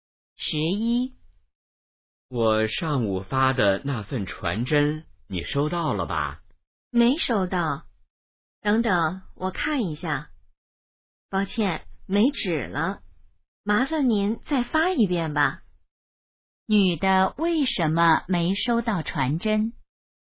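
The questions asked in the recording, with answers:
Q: 女的为什么没收到传真?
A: 传真机没纸了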